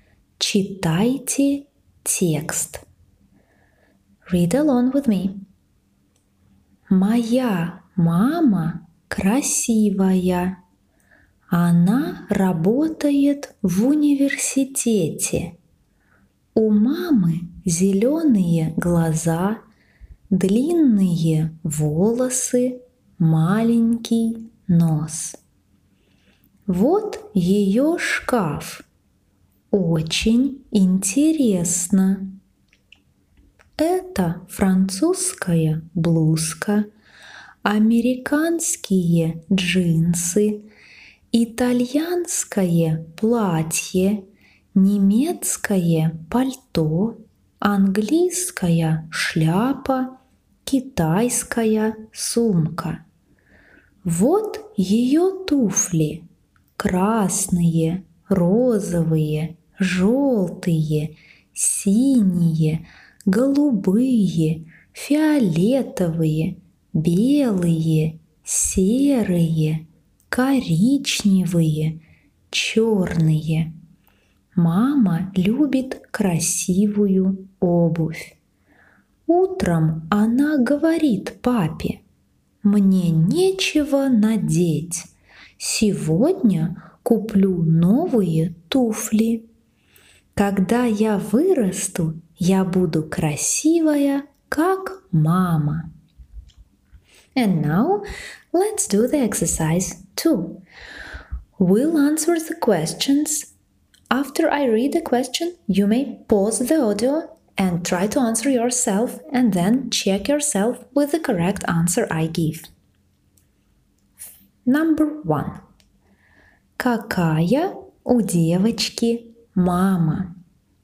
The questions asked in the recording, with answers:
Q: Какая у девочки мама?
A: У девочки красивая мама.